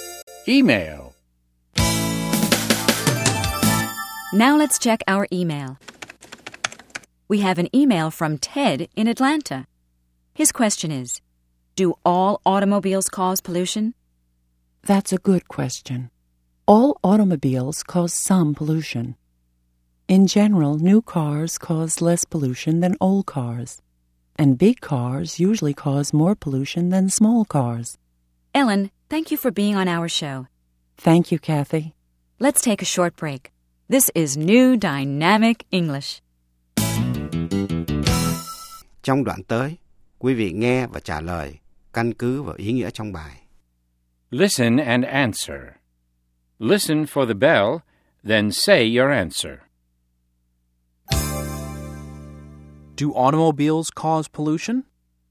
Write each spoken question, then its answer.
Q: Do automobiles cause pollution?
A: Yes, they do. Automobiles cause pollution.